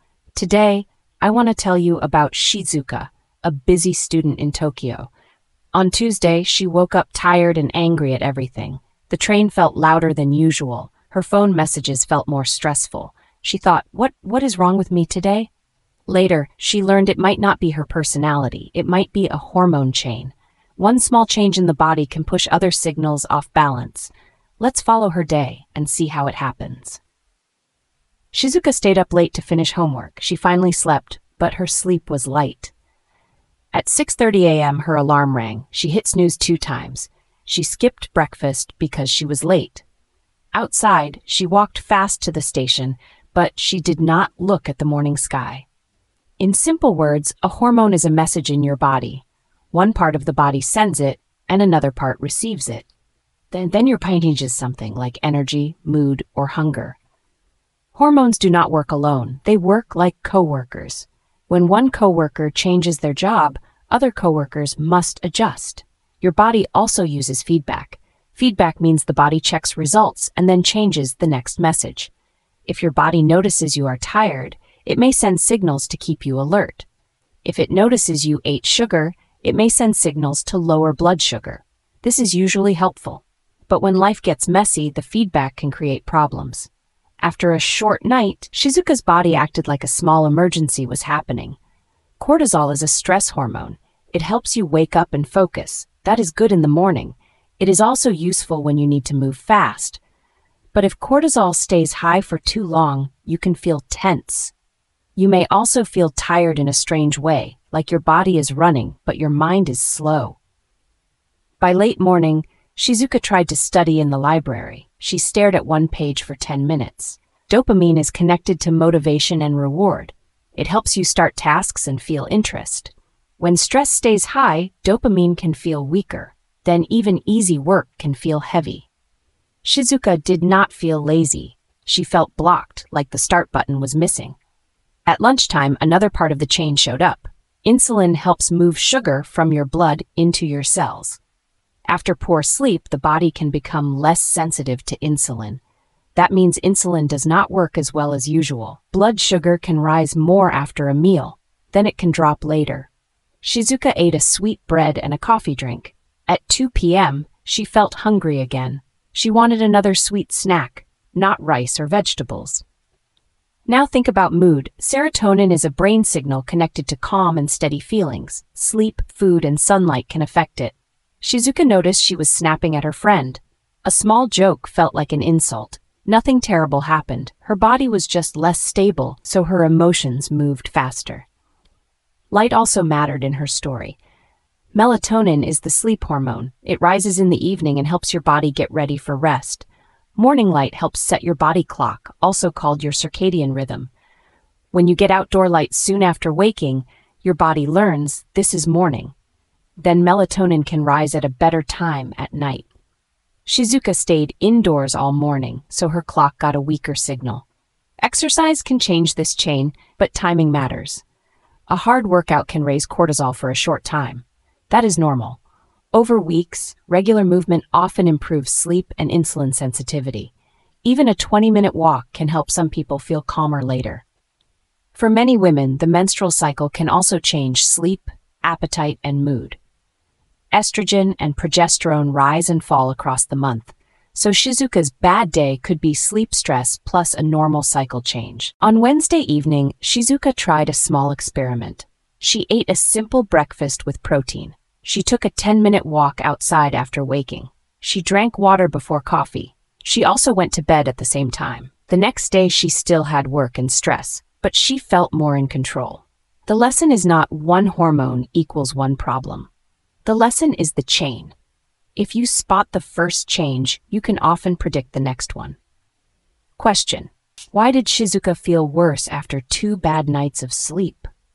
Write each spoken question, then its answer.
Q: why did Shizuka feel worse after 2 bad nights of sleep?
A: her body kept stress signals higher, so focus and mood became less steady.